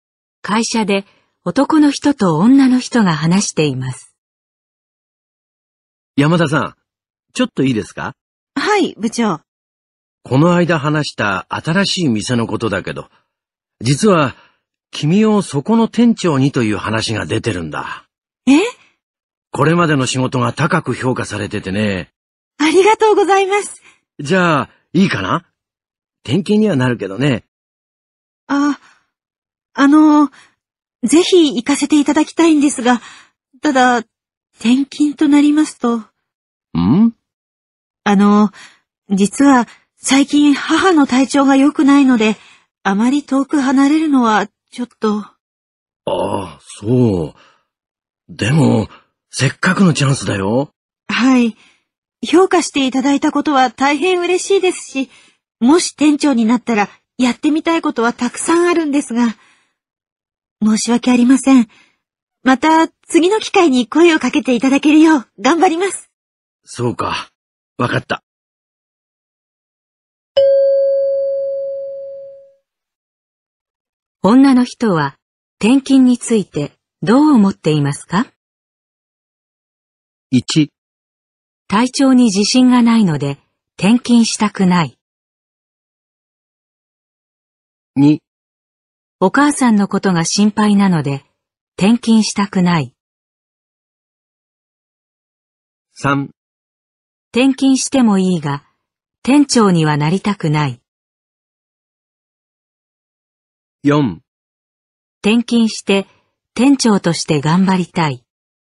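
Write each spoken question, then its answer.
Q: 女の人は転勤についてどう思っていますか?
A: 2: お母さんのことが心配なので転勤したくない。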